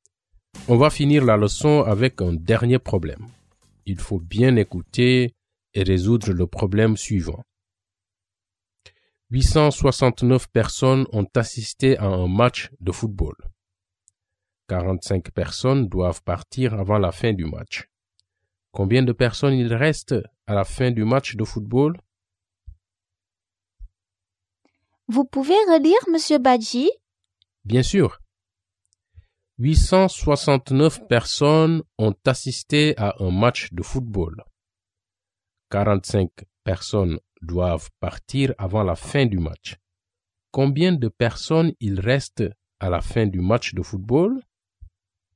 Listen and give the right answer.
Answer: Donc, il y a 824 personnes à la fin du match de football.